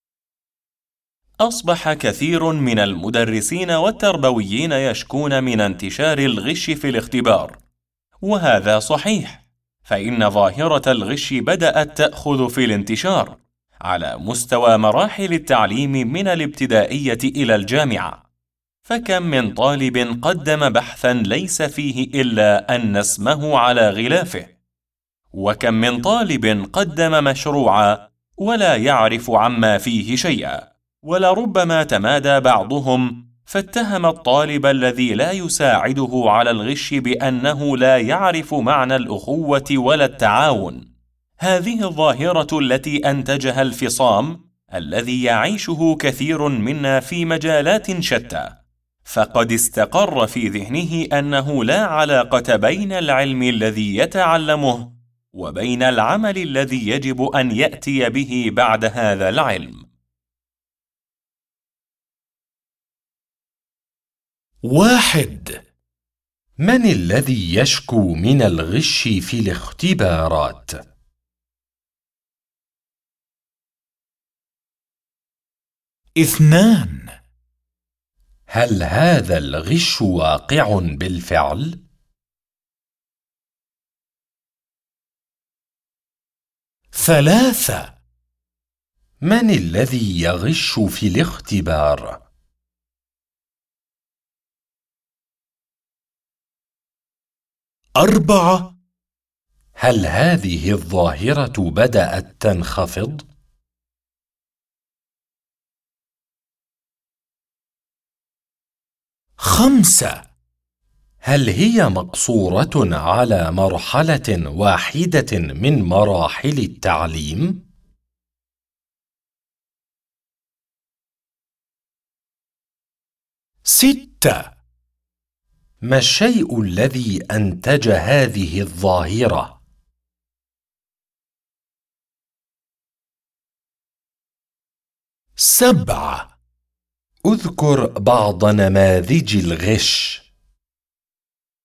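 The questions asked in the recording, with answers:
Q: من الذي يشكو من الغش في الاختبارات؟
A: كثير من المدرسين والتربويين

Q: هل هذا الغش واقع بالفعل؟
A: نعم، هذا صحيح

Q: من الذي يغش في الاختبار؟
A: الطلاب

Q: هل هذه الظاهرة بدأت تنخفض؟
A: لا، بدأت تأخذ في الانتشار

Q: هل هي مقصورة على مرحلة واحدة من مراحل التعليم؟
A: لا، من الابتدائية إلى الجامعة

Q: ما الشيء الذي أنتج هذه الظاهرة؟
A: الفصام بين العلم والعمل

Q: اذكر بعض نماذج الغش.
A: تقديم بحث أو مشروع لا يعرف الطالب عنه شيئاً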